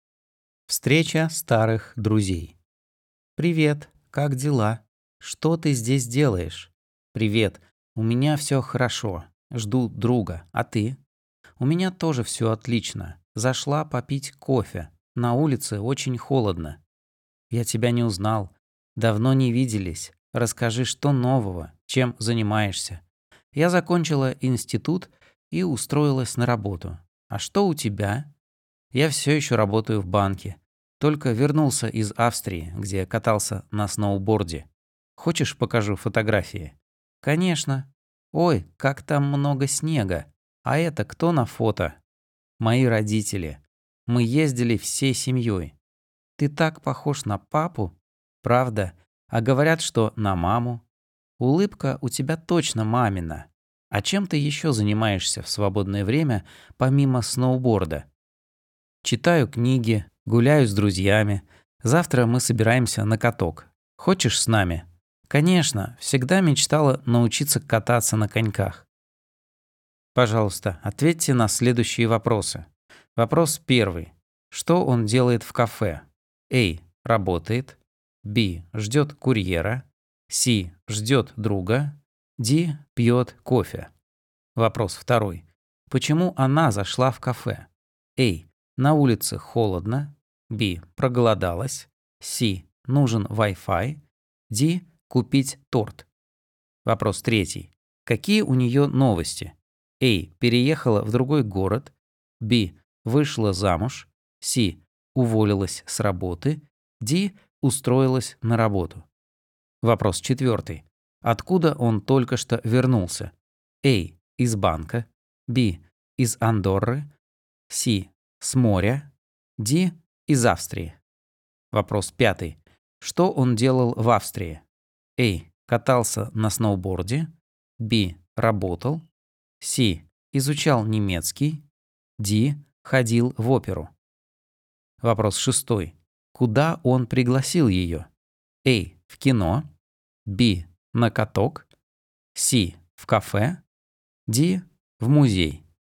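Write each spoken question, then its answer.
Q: Что он делает в кафе?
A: C: Ждет друга.

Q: Почему она зашла в кафе?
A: A: На улице холодно.

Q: Какие у нее новости?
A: D: Устроилась на работу.

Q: Откуда он только что вернулся?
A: D: Из Австрии.

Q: Что он делал в Австрии?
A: A: Катался на сноуборде.

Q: Куда он пригласил ее?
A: B: На каток.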